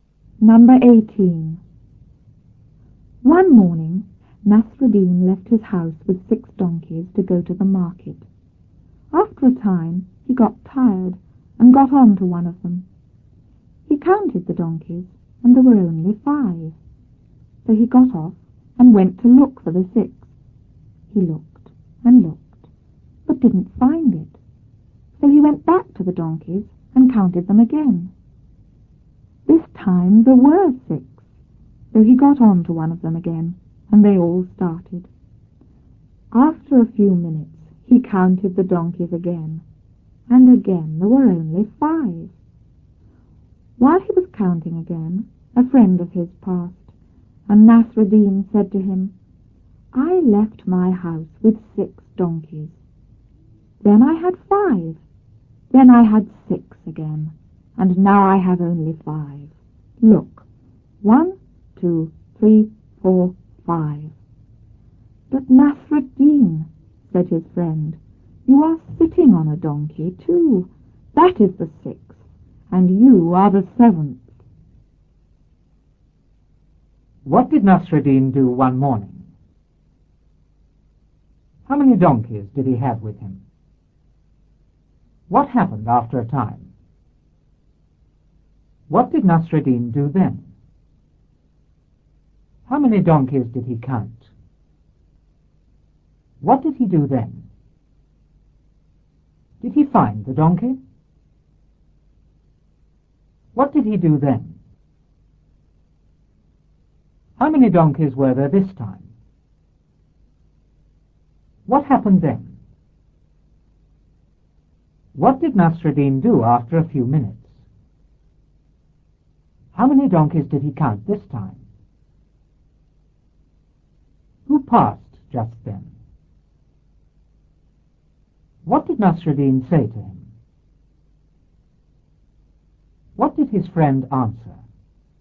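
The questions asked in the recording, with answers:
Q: What did Nasruddin do one morning?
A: He left his house with 6 donkeys to go to the market.

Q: How many donkeys did he have with him?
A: Six

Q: What happened after a time?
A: He got tired and got on to one of them.

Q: What did Nasruddin do then?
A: He counted the donkeys.

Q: How many donkeys did he count?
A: Five

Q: What did he do then?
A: He got off and went to look for the sixth.

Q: Did he find the donkey?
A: No

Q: What did he do then?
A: He went back to the donkeys and counted them again.

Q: How many donkeys were there this time?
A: Six

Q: What happened then?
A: He got on to one of them again and they all started.

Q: What did Nasruddin do after a few minutes?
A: He counted the donkeys again.

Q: How many donkeys did he count this time?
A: Five

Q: Who passed just then?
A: A friend of his

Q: What did Nasruddin say to him?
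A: I left my house with 6 donkeys, then I had 5, then 6 again, and now only 5.

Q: What did his friend answer?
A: You are sitting on a donkey too; that is the 6th, and you are the 7th.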